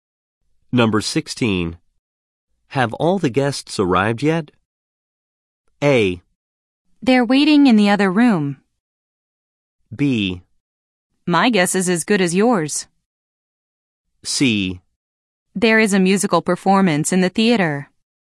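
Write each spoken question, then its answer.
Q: Have all the guests arrived yet?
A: A: They're waiting in the other room.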